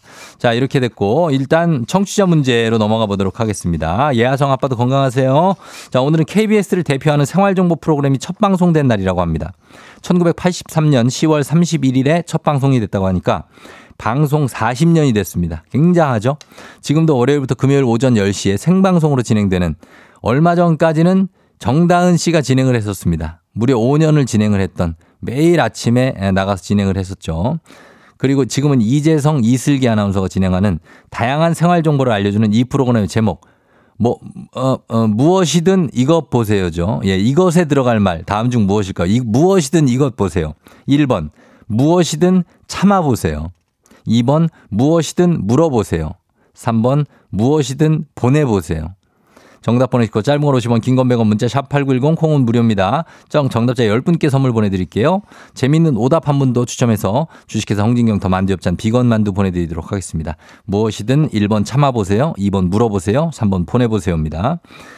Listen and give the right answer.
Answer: 정답은 무엇이든 물어보세요죠.